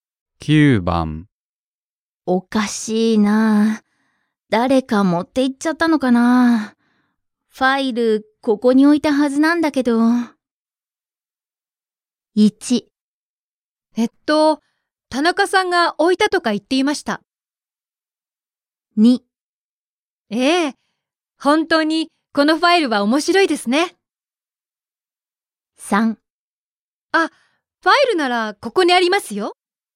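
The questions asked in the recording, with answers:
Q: おかしいなぁ。誰か持って行っちゃったのかなぁ。ファイル、ここに置いたはずなんだけど。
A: 3: あ、ファイルならここにありますよ。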